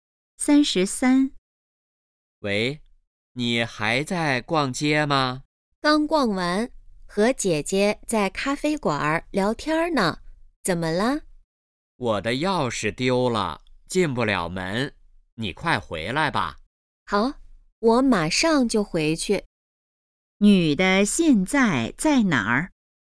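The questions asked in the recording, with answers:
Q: 女的现在在哪儿?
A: 咖啡馆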